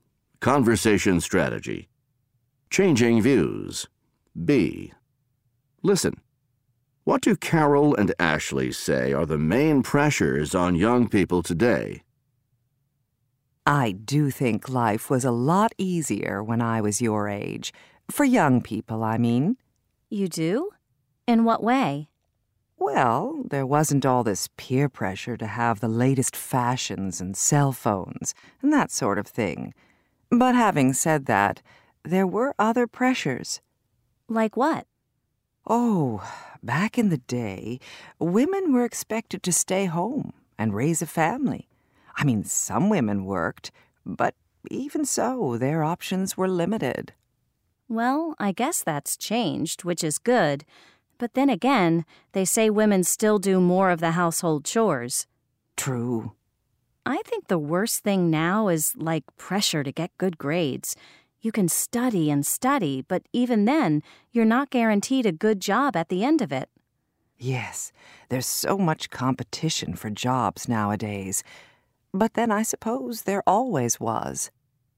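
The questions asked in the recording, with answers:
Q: What do Carol and Ashley say are the main pressures on young people today?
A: Peer pressure to have the latest fashions and cell phones, and pressure to get good grades amid competition for jobs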